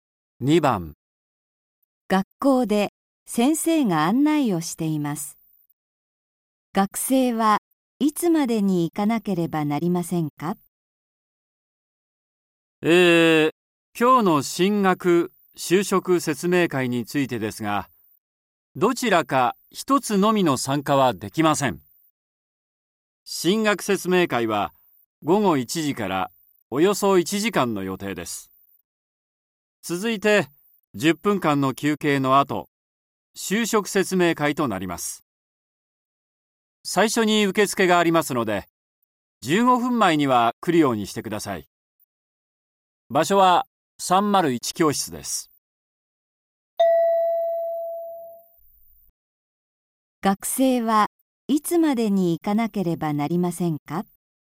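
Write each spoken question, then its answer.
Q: 学生はいつまでに行かなければなりませんか?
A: 午後12時45分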